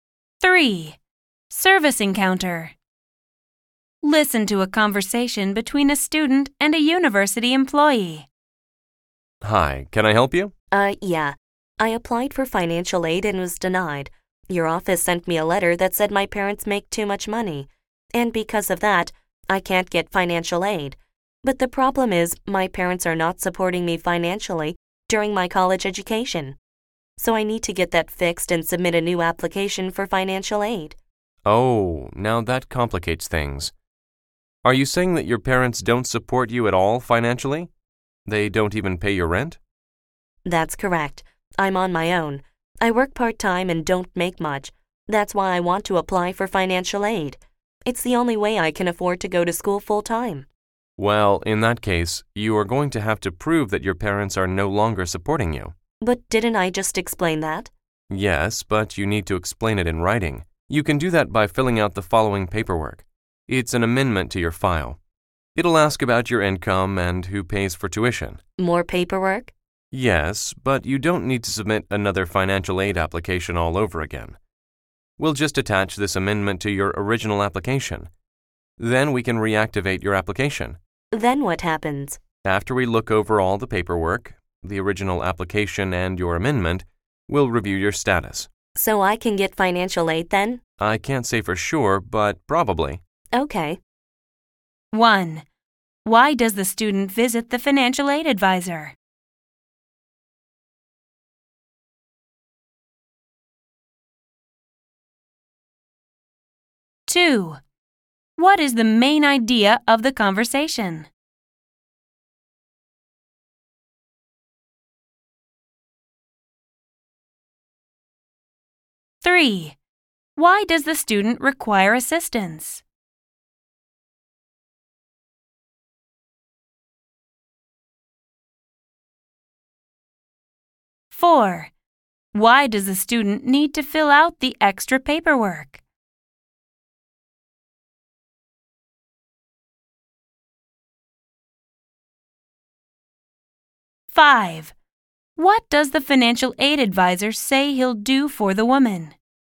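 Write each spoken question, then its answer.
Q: Why does the student visit the financial aid advisor?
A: She was denied financial aid and wants to fix it and reapply

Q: What is the main idea of the conversation?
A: How the student can fix her denied financial aid application

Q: Why does the student require assistance?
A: Her aid was denied because of her parents' income, but they don't support her

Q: Why does the student need to fill out the extra paperwork?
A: To prove in writing that her parents no longer support her

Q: What does the financial aid advisor say he'll do for the woman?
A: Attach the amendment to her original application, reactivate it and review her status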